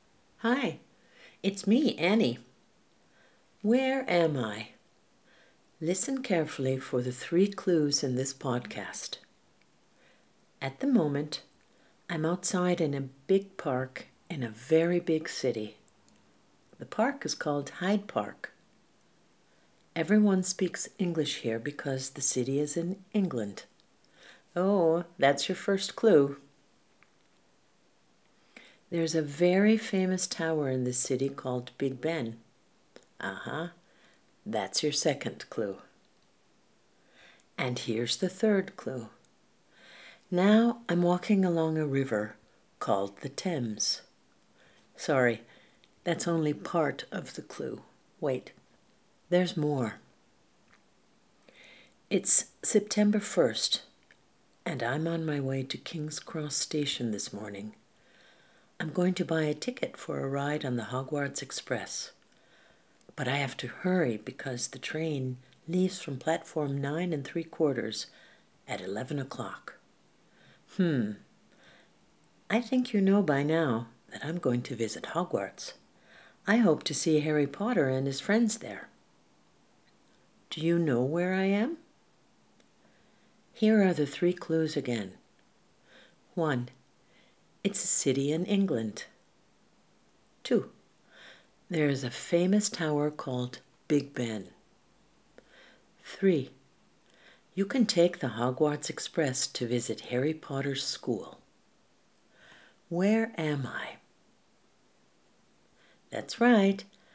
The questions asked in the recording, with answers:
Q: Where am I?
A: I'm in London.